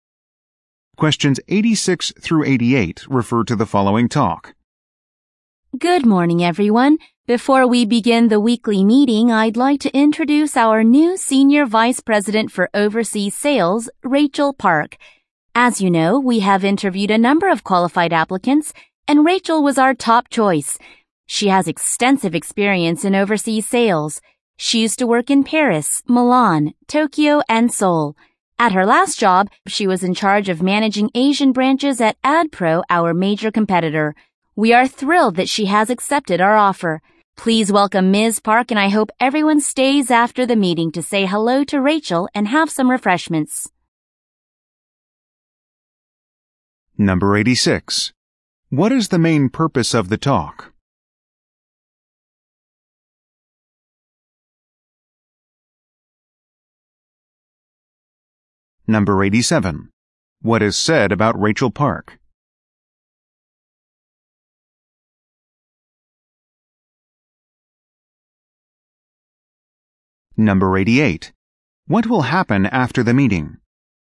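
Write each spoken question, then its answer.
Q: What is the main purpose of the talk?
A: To introduce a new senior vice president

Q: What will happen after the meeting?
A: Staff will greet Rachel and have refreshments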